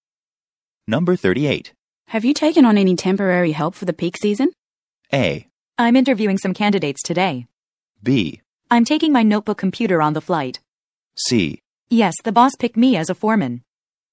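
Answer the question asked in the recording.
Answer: A: I'm interviewing some candidates today.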